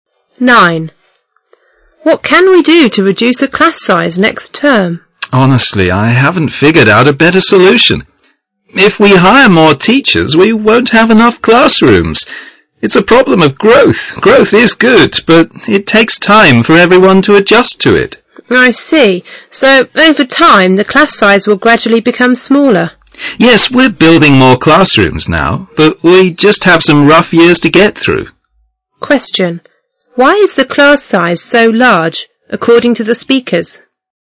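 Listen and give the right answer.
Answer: The school is growing fast and there aren't enough classrooms yet.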